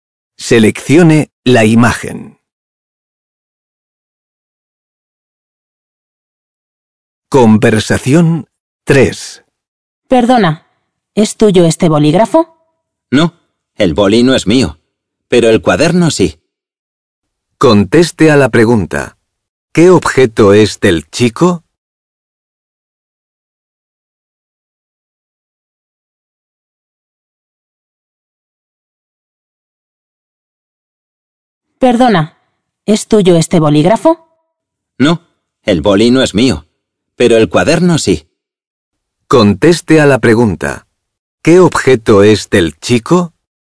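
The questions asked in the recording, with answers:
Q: ¿Qué objeto es del chico?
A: el cuaderno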